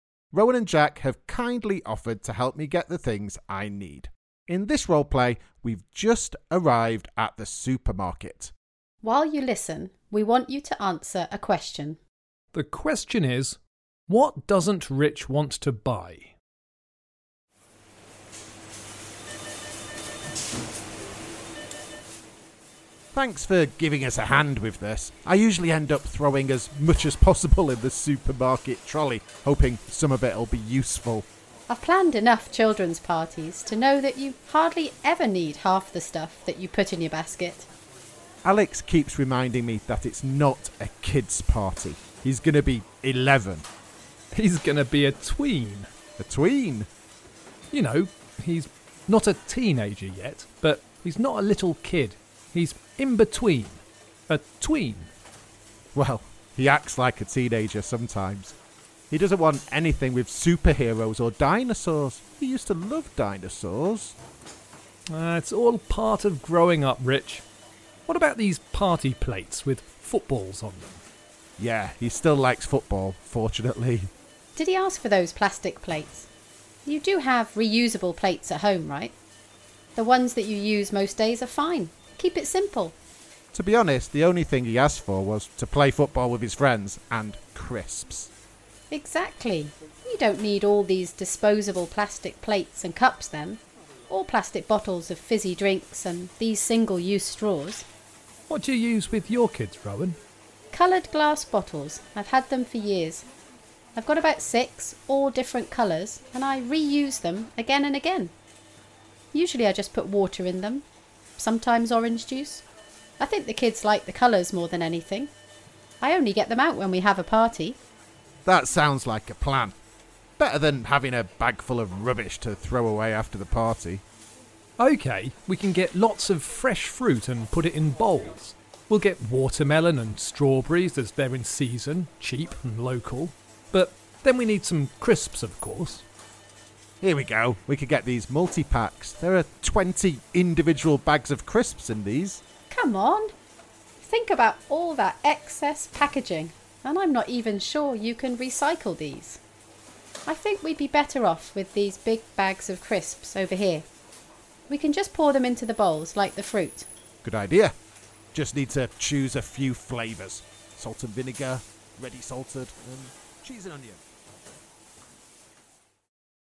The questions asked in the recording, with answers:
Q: The question is, what doesn't Rich want to buy?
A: Well, I decided not to buy lots of things. Things like plastic cups and plates, single-use straws, and anything with too much packaging.